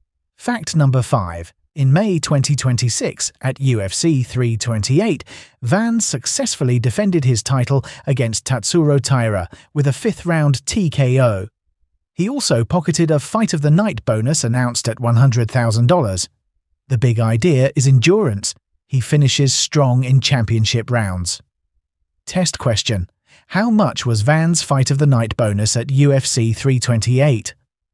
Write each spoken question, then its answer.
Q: how much was Van's Fight of the Night bonus at UFC 328?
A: $100,000.